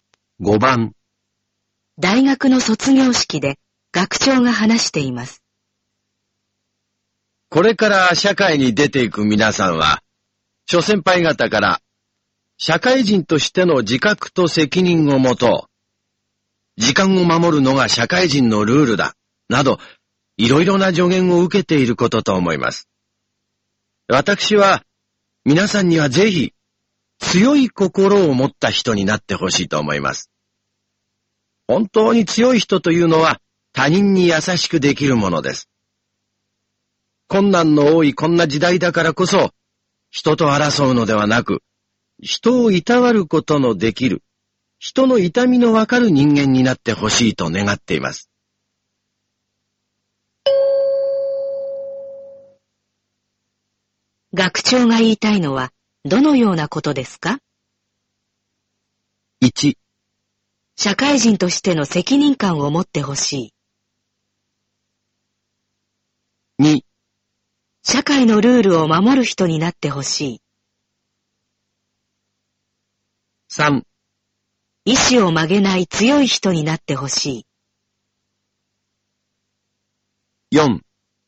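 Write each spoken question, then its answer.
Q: 学長が言いたいのは、どのようなことですか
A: 4: 思いやりの心を持ってほしい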